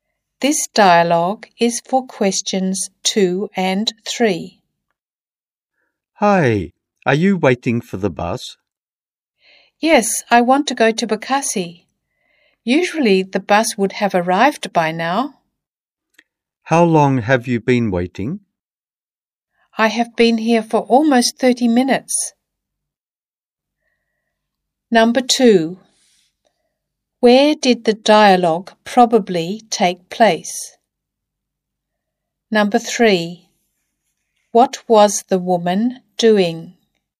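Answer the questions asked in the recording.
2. At a bus stop
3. Waiting for the bus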